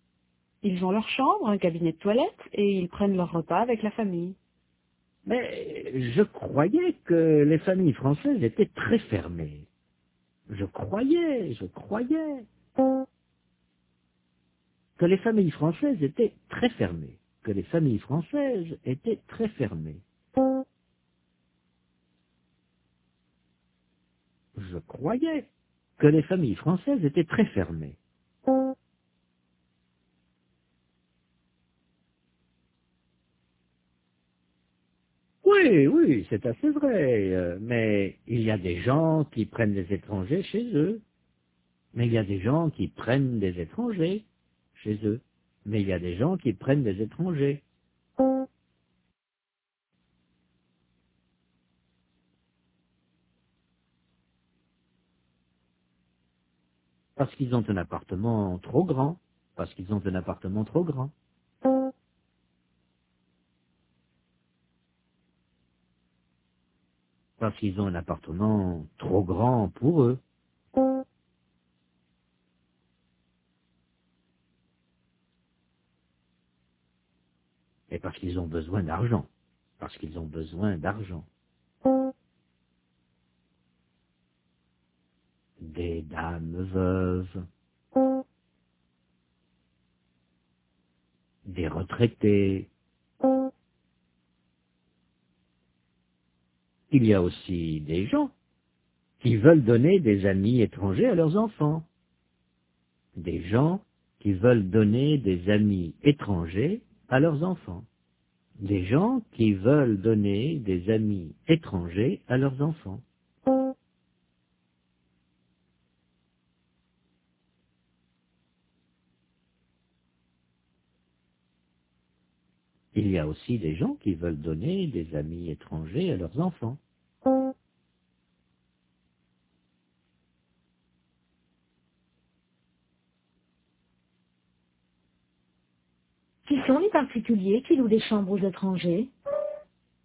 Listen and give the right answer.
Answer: Des dames veuves, des retraités.